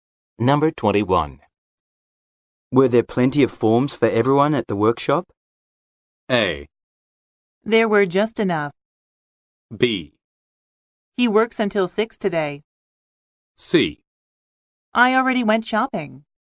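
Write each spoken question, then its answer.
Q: Were there plenty of forms for everyone at the workshop?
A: A: There were just enough.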